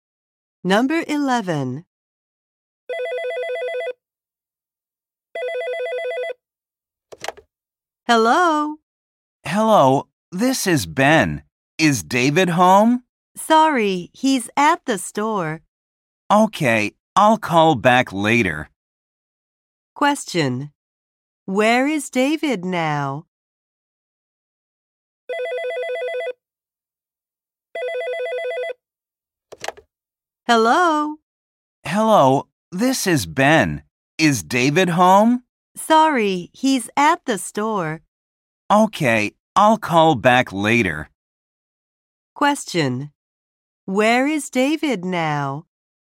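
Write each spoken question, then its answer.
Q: Where is David now?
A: At the store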